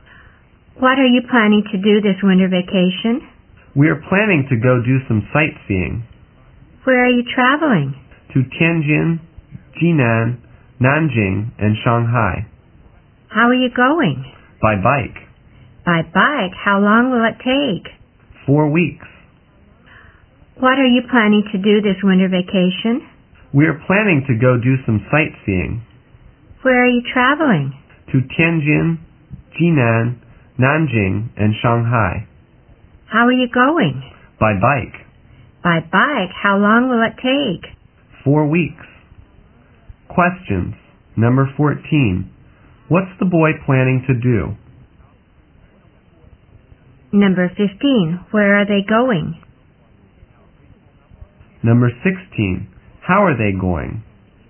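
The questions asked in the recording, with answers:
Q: What's the boy planning to do?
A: Go sightseeing

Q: Where are they going?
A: Tianjin, Jinan, Nanjing and Shanghai

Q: How are they going?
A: By bike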